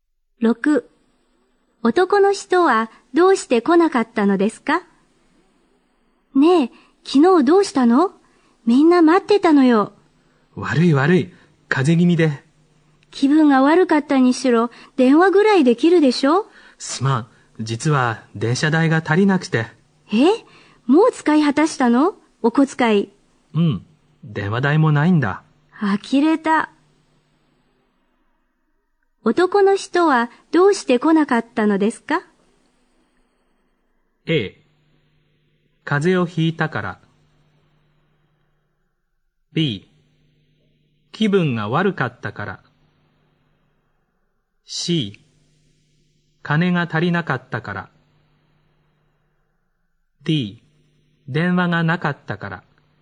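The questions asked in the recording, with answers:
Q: 男の人はどうして来なかったのですか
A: C: 金が足りなかったから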